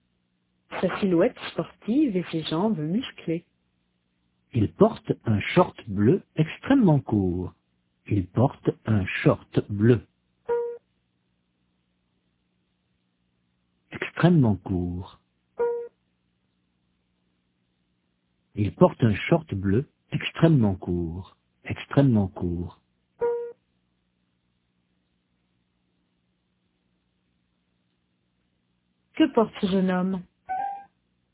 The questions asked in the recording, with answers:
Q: Que porte ce jeune homme?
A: Un short bleu extrêmement court.